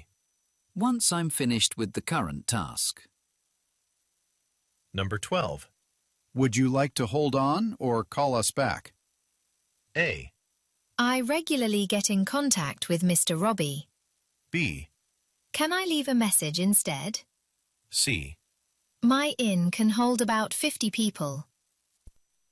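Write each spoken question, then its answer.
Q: Would you like to hold on or call us back?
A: B: Can I leave a message instead?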